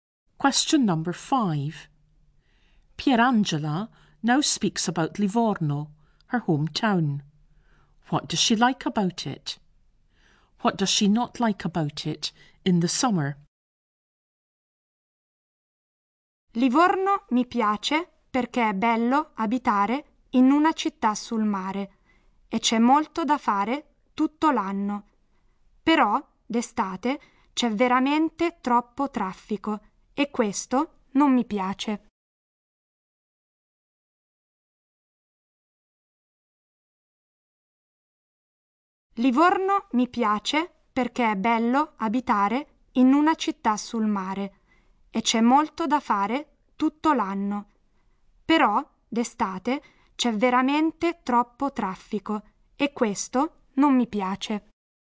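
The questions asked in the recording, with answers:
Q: What does she like about it?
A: It's nice living in a town by the sea and there's a lot to do all year

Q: What does she not like about it in the summer?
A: There is too much traffic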